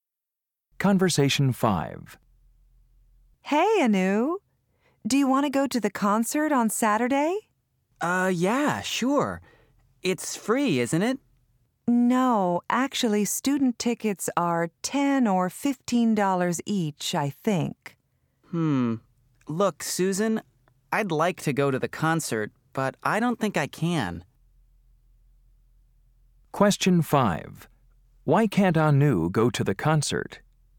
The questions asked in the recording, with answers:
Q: Why can't Anu go to the concert?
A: Well, I just don't think I have enough money to pay for you and me.